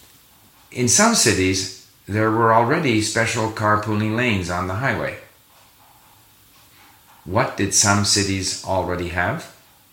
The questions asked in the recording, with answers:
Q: What did some cities already have?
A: Some cities already had special carpooling lanes on the highway.